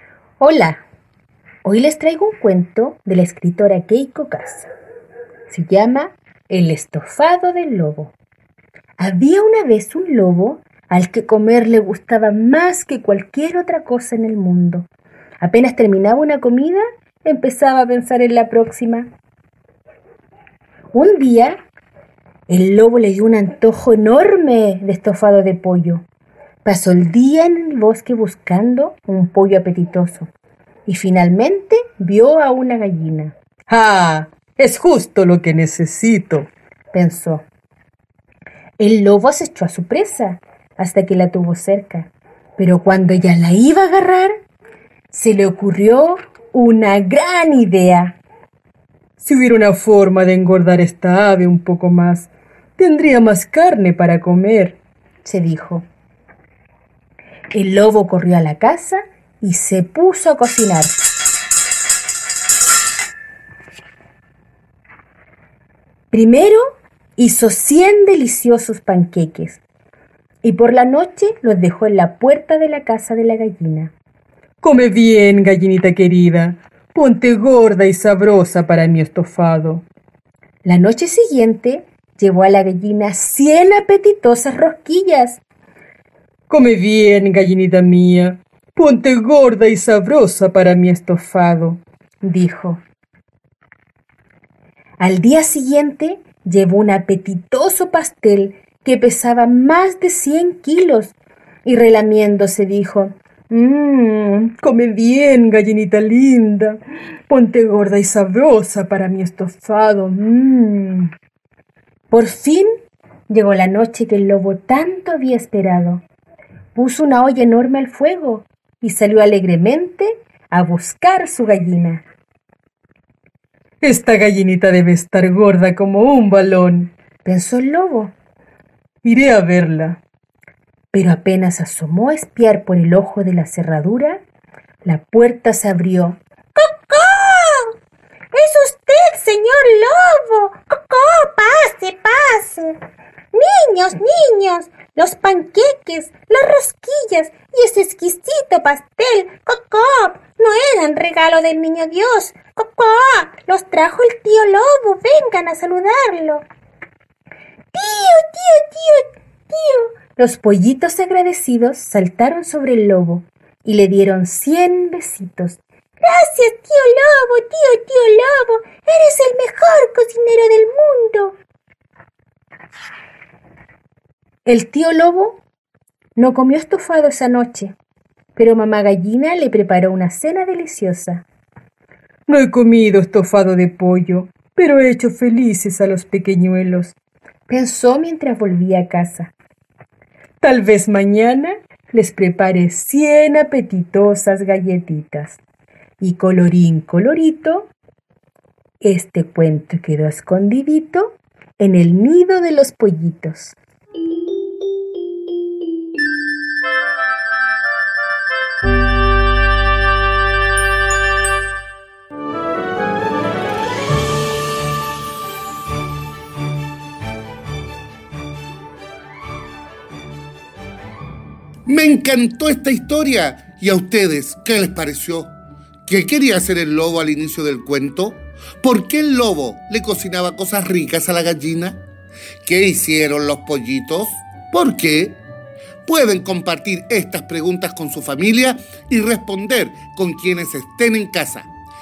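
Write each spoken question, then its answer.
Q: ¿Qué quería hacer el lobo al inicio del cuento?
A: Comer un estofado de pollo

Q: ¿Por qué el lobo le cocinaba cosas ricas a la gallina?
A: Para engordarla y tener más carne para su estofado

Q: ¿Qué hicieron los pollitos?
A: Saltaron sobre el lobo y le dieron cien besitos para agradecerle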